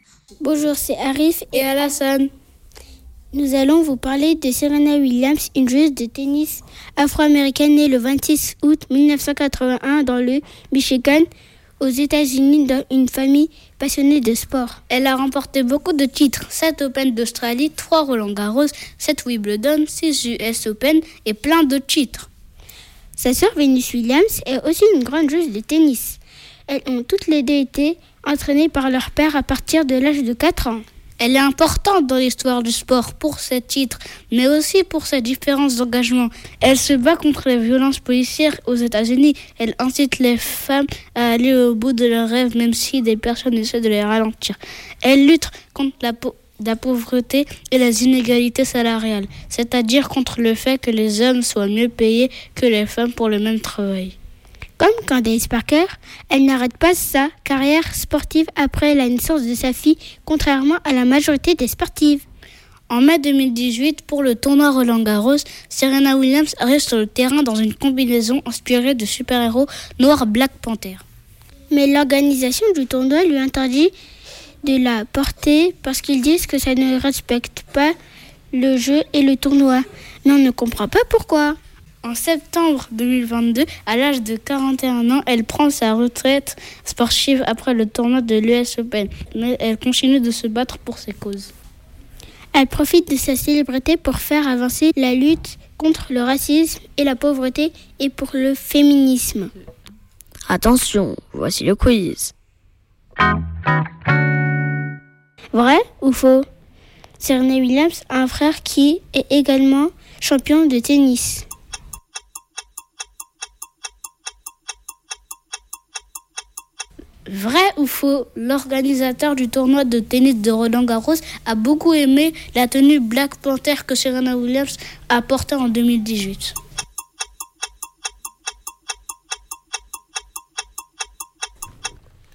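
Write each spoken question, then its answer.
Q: Vrai ou faux ? Serena Williams a un frère qui est également champion de tennis.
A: Faux

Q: Vrai ou faux, l'organisateur du tournoi de tennis de Roland-Garros a beaucoup aimé la tenue Black Panther que Serena Williams a portée en 2018.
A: Faux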